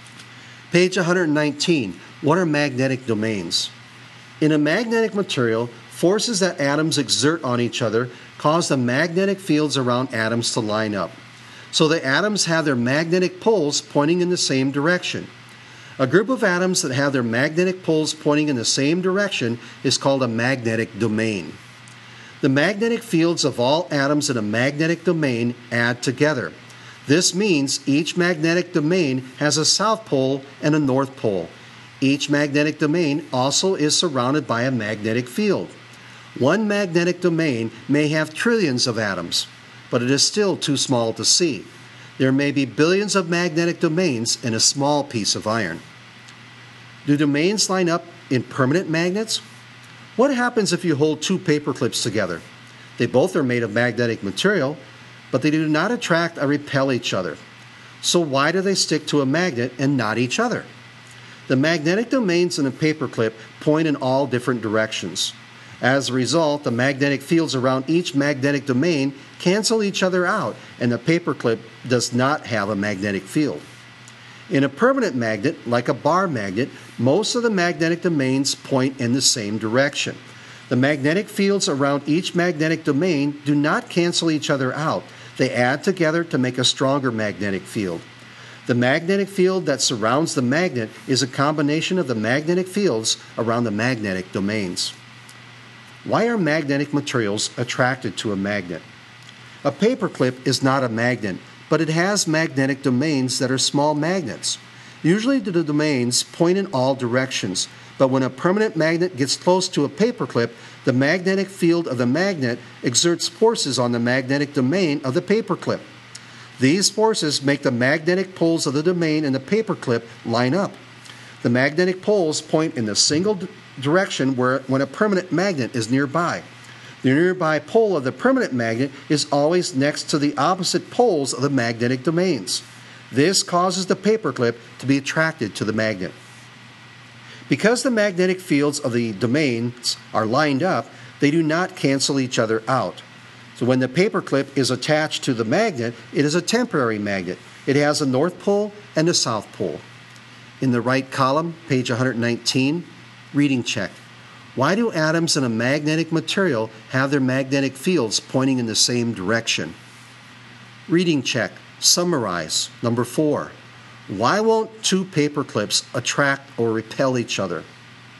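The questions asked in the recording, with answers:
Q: Why won't two paper clips attract or repel each other?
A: Their magnetic domains point in all different directions, so the magnetic fields cancel out and the paper clips have no magnetic field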